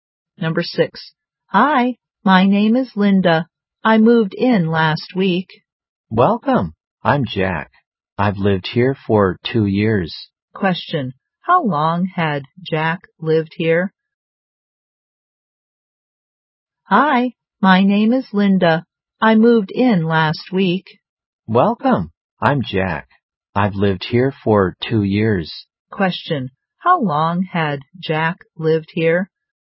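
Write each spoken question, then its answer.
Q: How long had Jack lived here?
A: For 2 years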